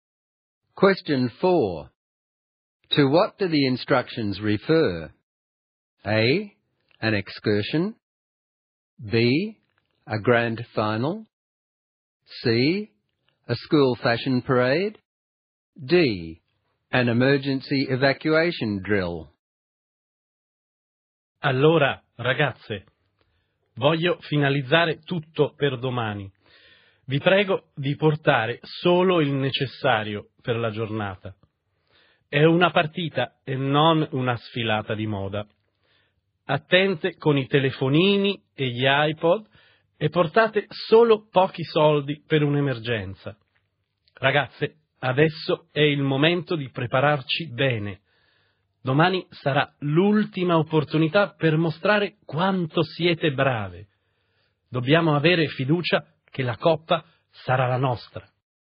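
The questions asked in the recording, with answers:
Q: To what do the instructions refer?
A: B: A grand final.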